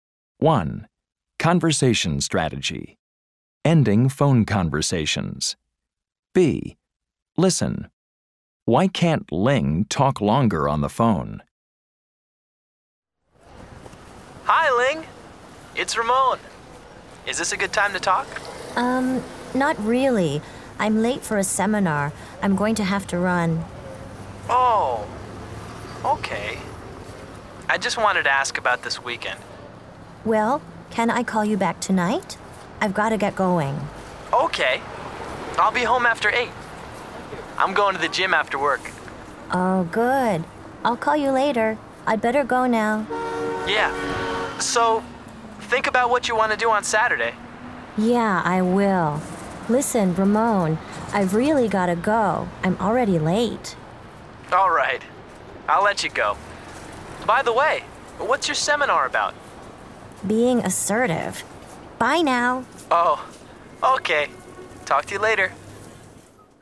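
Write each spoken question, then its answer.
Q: Why can't Ling talk longer on the phone?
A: She's late for a seminar.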